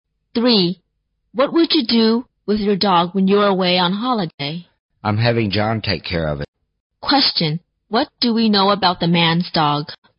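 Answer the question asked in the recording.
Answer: John will take care of it while he's away.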